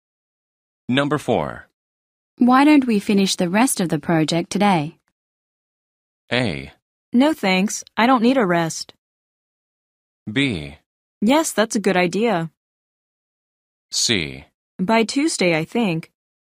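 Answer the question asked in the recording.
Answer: B: Yes, that's a good idea.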